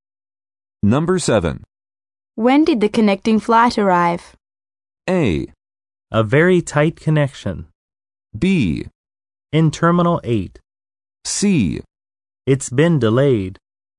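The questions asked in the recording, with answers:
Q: When did the connecting flight arrive?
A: C: It's been delayed.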